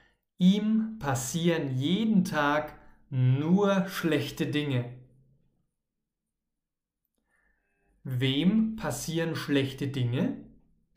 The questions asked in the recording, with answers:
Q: Wem passieren schlechte Dinge?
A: Ihm, also Sandro.